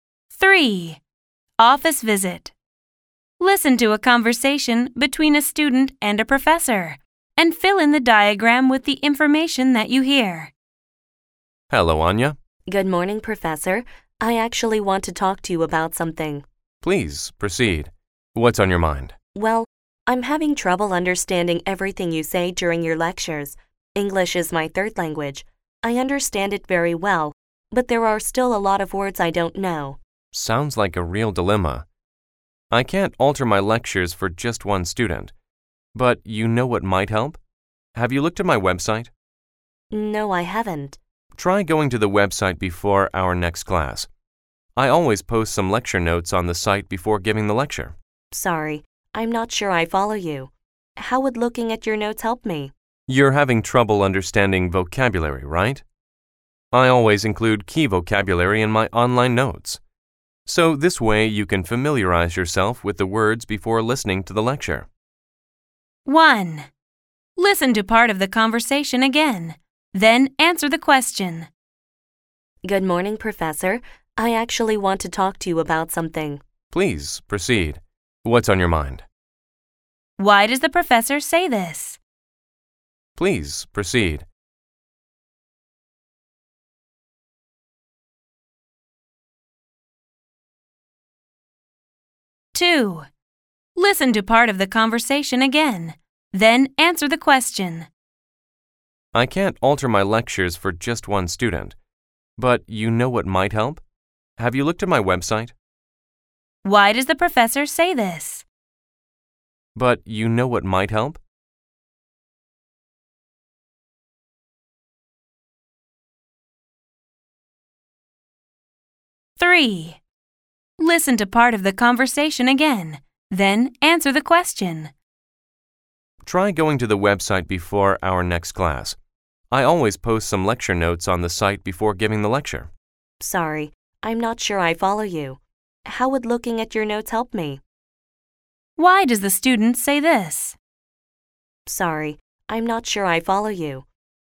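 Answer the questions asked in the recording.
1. To invite the student to go on and say what she wants to talk about
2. To introduce a suggestion that could help her (looking at his website)
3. She doesn't understand how the professor's suggestion would help her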